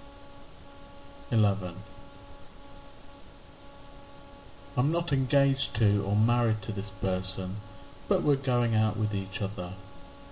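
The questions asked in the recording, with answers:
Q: I'm not engaged to or married to this person, but we're going out with each other.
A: boyfriend or girlfriend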